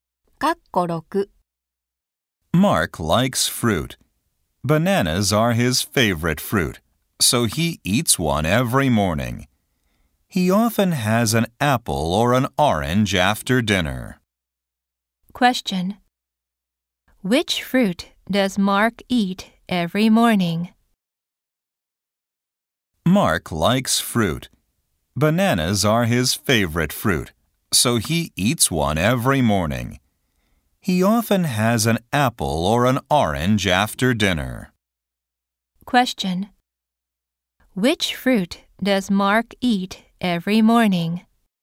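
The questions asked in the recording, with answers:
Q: Which fruit does Mark eat every morning?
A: A banana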